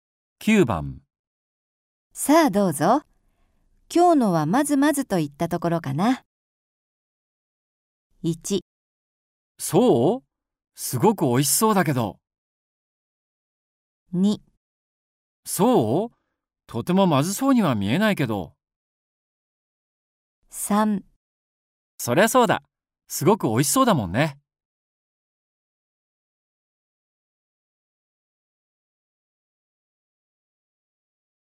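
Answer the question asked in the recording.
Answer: 1: そう?すごく美味しそうだけど。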